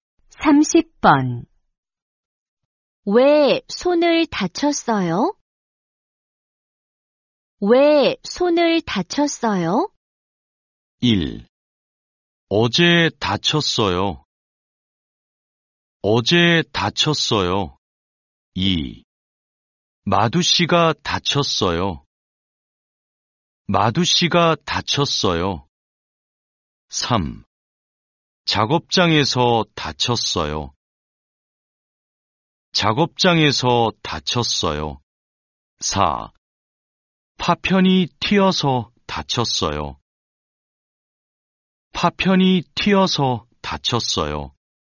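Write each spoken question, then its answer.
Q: 왜 손을 다쳤어요?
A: 4: 파편이 튀어서 다쳤어요.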